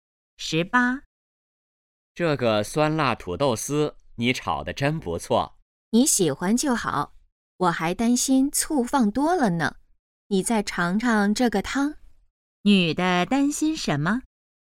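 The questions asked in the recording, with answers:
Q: 女的担心什么?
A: 醋放多了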